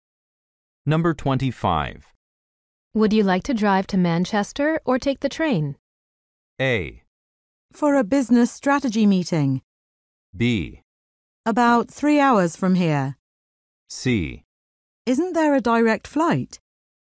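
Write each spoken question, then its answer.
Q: Would you like to drive to Manchester or take the train?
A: C: Isn't there a direct flight?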